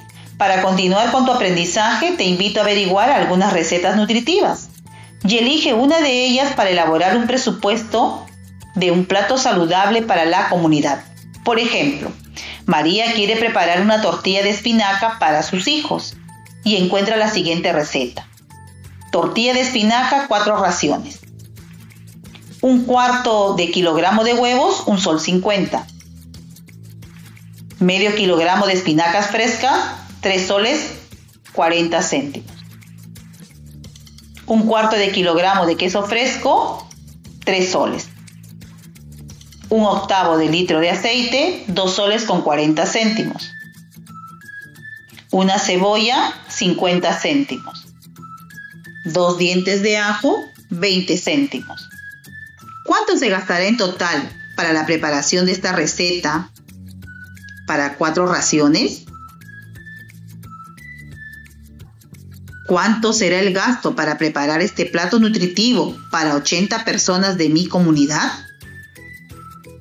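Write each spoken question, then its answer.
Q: ¿Cuánto se gastará en total para la preparación de esta receta para cuatro raciones?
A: 11 soles

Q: ¿Cuánto será el gasto para preparar este plato nutritivo para 80 personas de mi comunidad?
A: 220 soles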